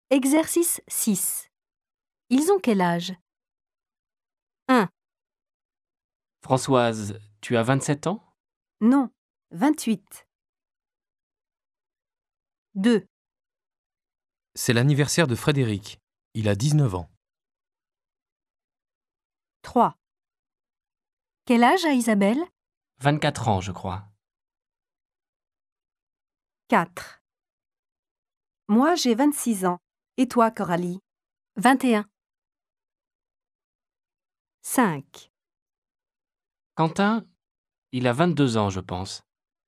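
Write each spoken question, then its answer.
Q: Ils ont quel âge ?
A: Françoise a 28 ans

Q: Ils ont quel âge ?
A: Frédéric a 19 ans

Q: Quel âge a Isabelle ?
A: 24 ans

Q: Ils ont quel âge ?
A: Coralie a 21 ans

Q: Ils ont quel âge ?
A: Quentin a 22 ans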